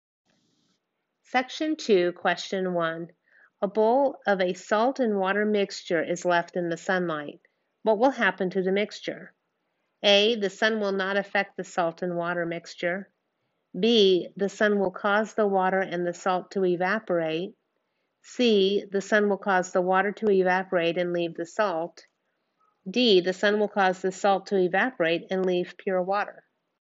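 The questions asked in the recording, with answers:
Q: What will happen to the mixture?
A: C: The sun will cause the water to evaporate and leave the salt.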